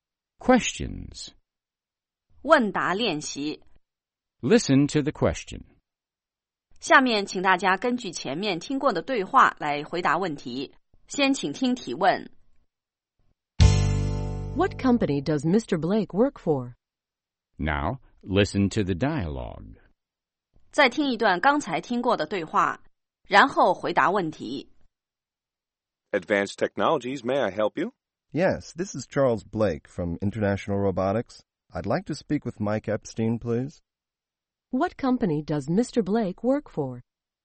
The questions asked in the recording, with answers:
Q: What company does Mr. Blake work for?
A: He works for International Robotics.